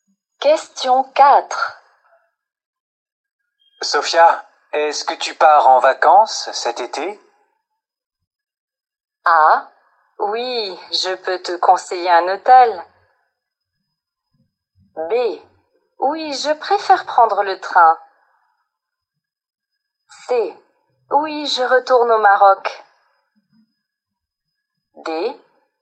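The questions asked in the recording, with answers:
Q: Sophia, est-ce que tu pars en vacances cet été?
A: C: Oui, je retourne au Maroc.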